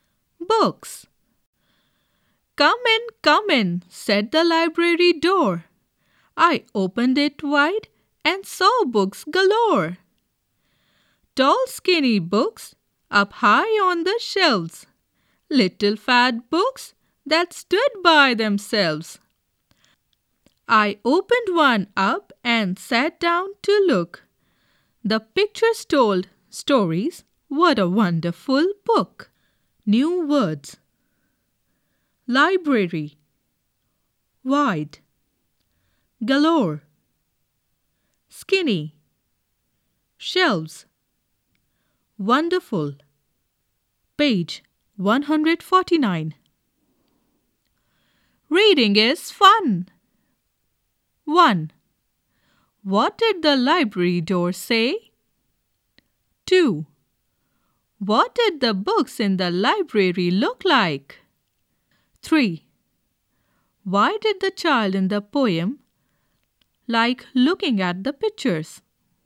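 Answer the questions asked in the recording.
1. Come in
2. Tall skinny books up high on the shelves and little fat books that stood by themselves
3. The pictures told stories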